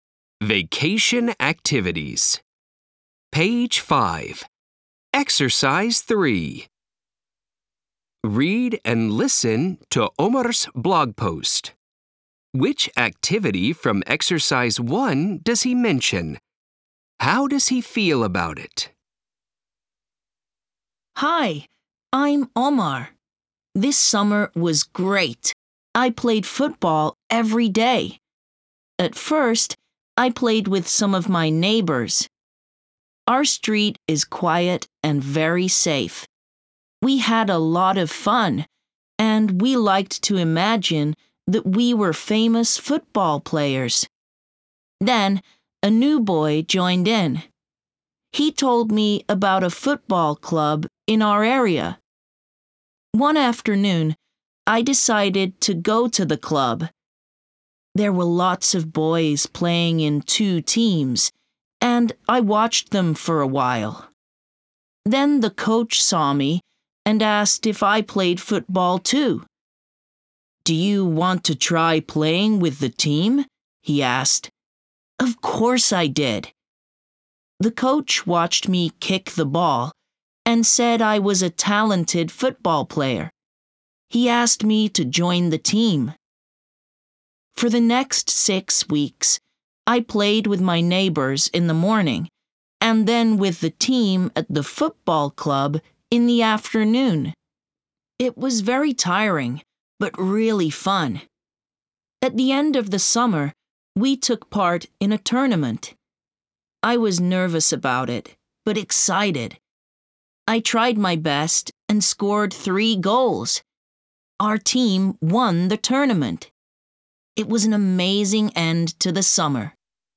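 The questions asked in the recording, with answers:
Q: Which activity from Exercise 1 does he mention?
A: Playing football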